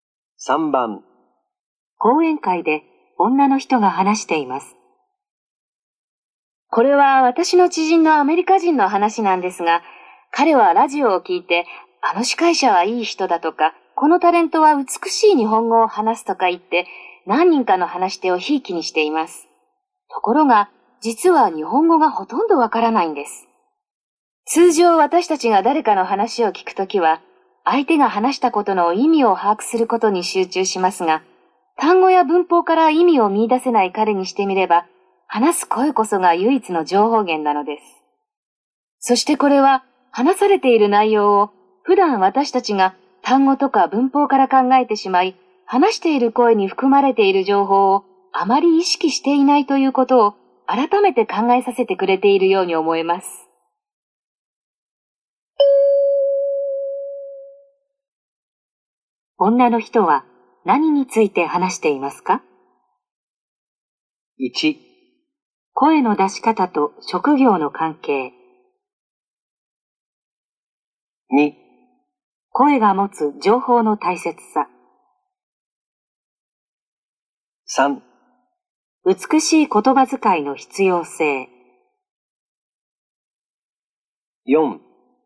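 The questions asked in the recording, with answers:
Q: 女の人は何について話していますか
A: 2: 声が持つ情報の大切さ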